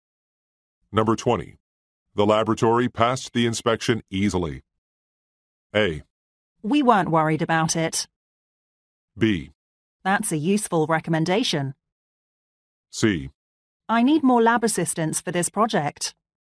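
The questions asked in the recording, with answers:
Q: The laboratory passed the inspection easily.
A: A: We weren't worried about it.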